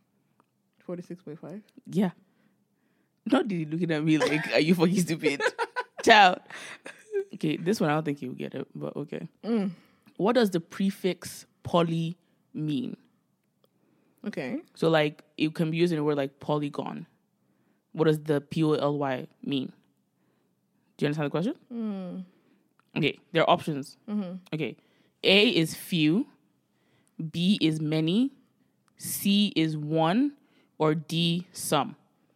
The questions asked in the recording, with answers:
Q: What does the prefix poly mean?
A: It will have to be many.